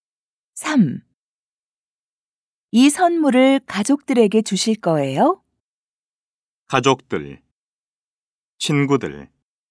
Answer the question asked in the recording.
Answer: 아니요. 가족들이 아니라 친구들에게 줄 거예요.